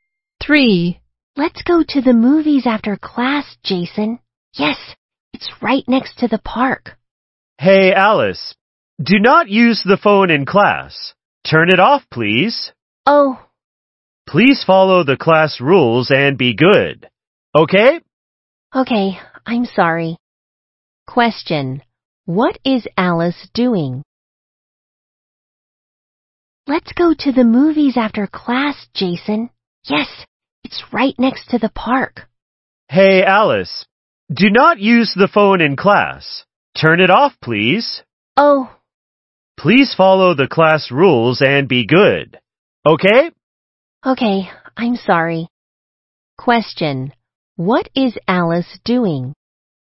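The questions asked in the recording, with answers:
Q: What is Alice doing?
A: Using her phone in class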